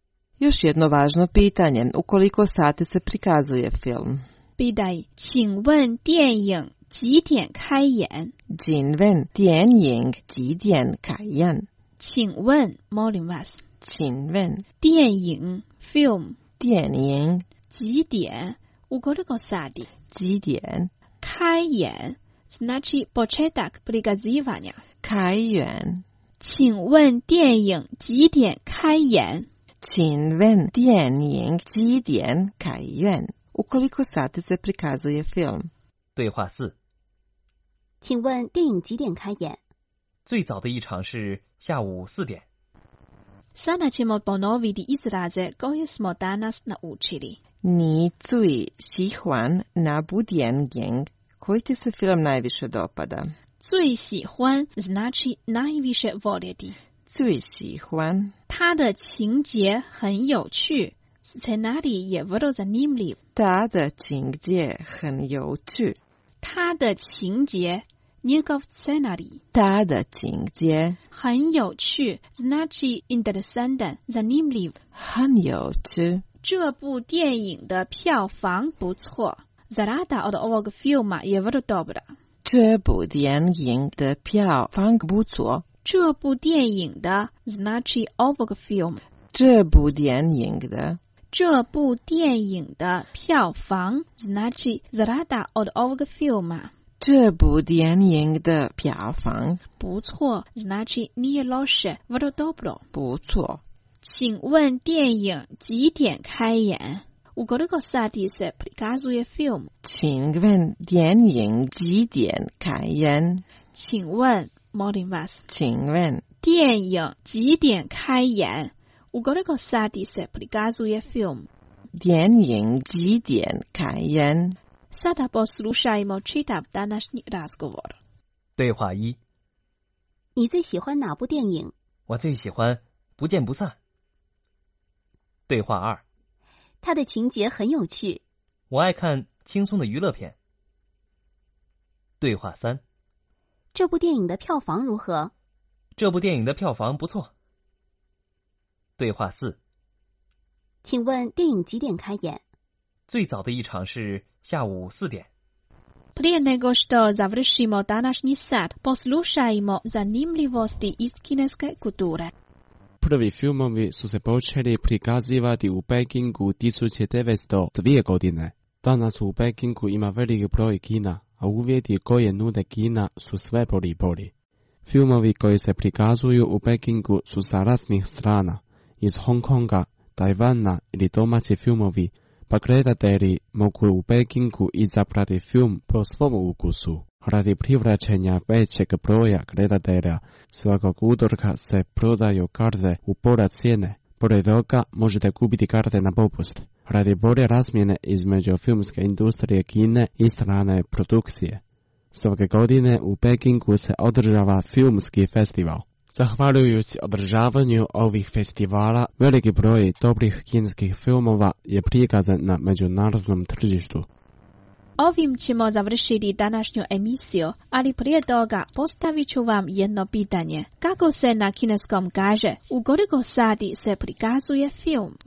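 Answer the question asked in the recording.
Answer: 请问电影几点开演?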